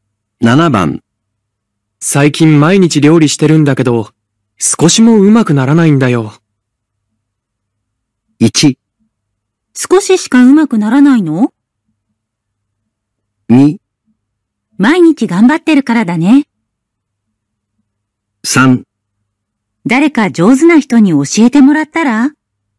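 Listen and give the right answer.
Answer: 3: 誰か上手な人に教えてもらったら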